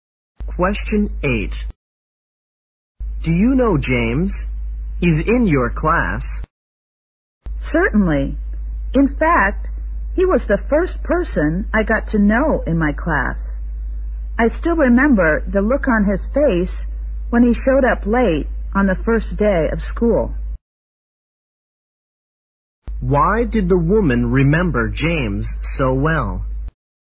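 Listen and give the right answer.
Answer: He showed up late on the first day of school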